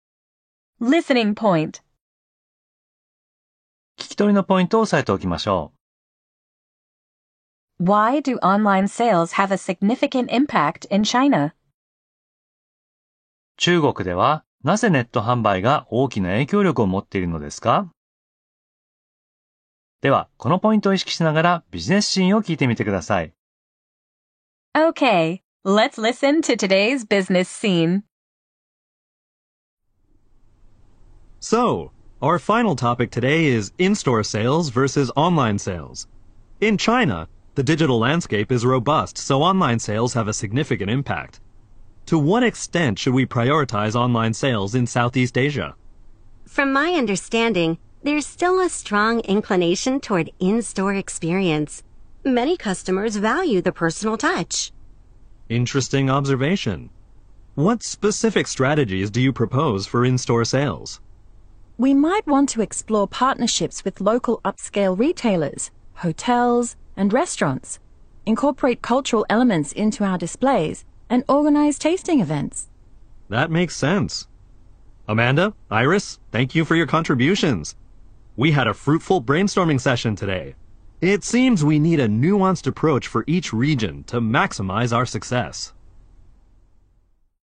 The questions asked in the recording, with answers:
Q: Why do online sales have a significant impact in China?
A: Because the digital landscape is robust.